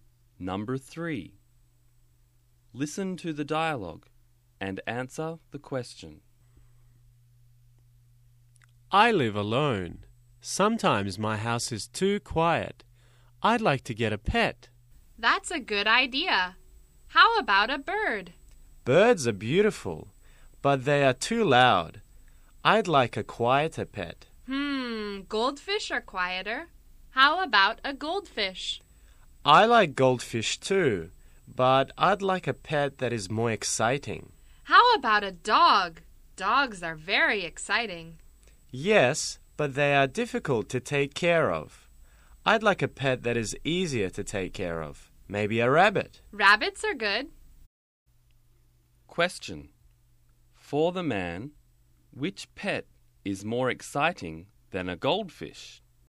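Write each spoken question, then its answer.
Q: For the man, which pet is more exciting than a goldfish?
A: A dog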